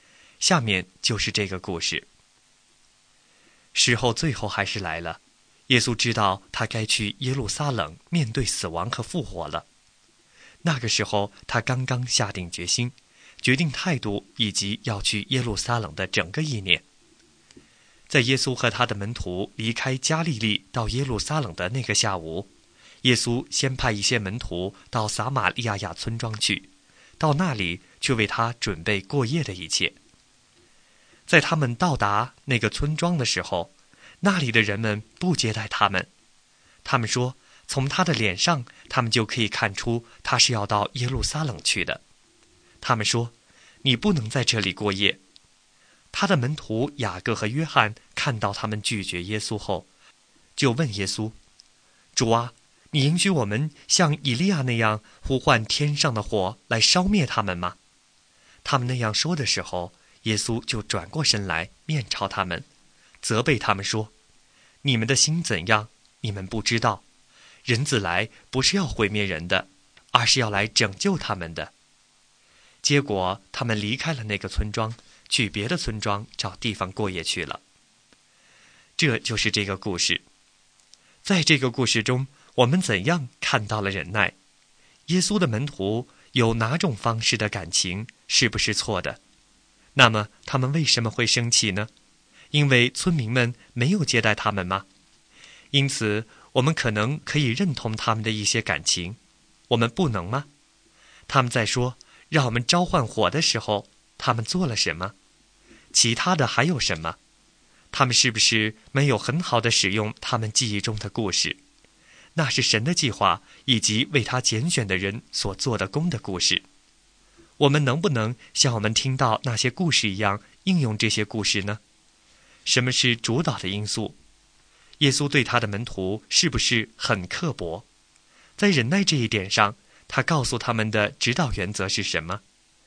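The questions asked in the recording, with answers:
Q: 在忍耐这一点上,他告诉他们的指导原则是什么?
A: 人子来不是要毁灭人的,而是要来拯救他们的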